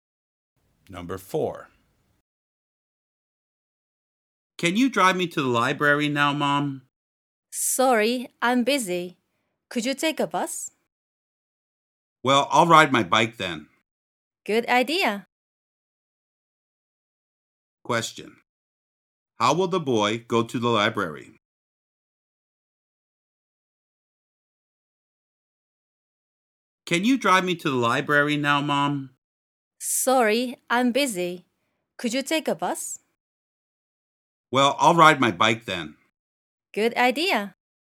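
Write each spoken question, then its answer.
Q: How will the boy go to the library?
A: By bike.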